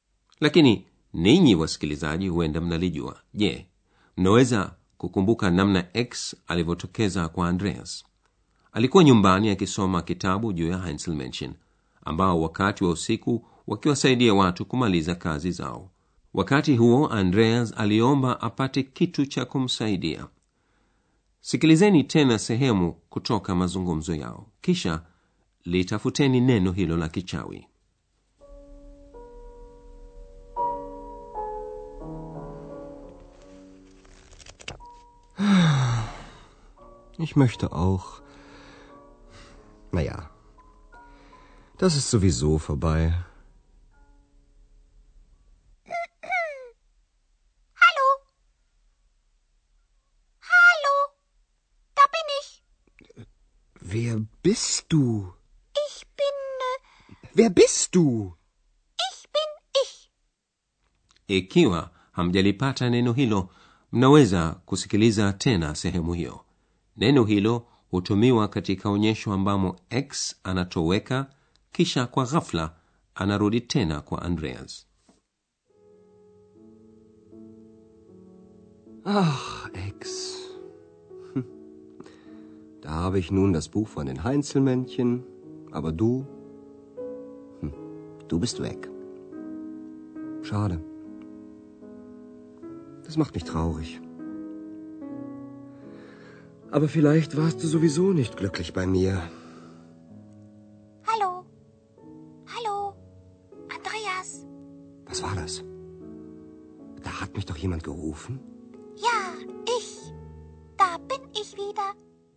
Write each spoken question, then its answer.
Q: sikilizeni tena sehemu kutoka mazungumzo yao kisha litafuteni neno hilo la kichawi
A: Neno lakichawi nie? Sowieso.